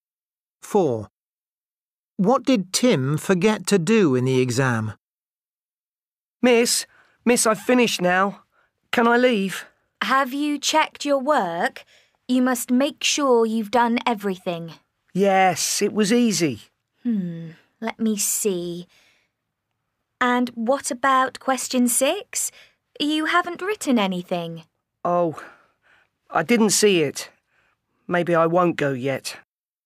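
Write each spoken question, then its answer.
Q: What did Tim forget to do in the exam?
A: Answer question 6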